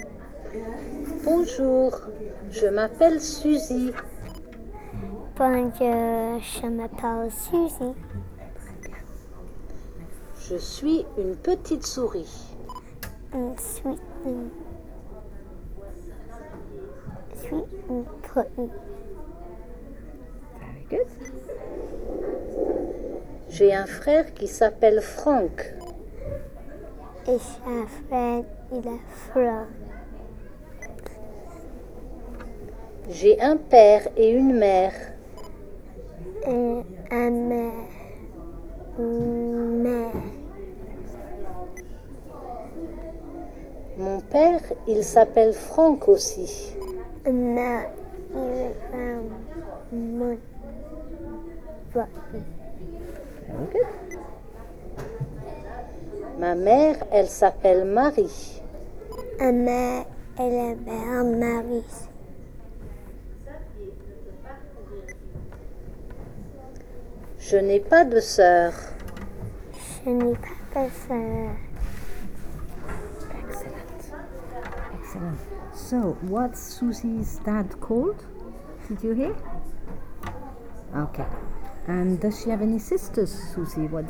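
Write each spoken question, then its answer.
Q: So, what's Susie's dad called?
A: Frank

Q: And does she have any sisters, Susie?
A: No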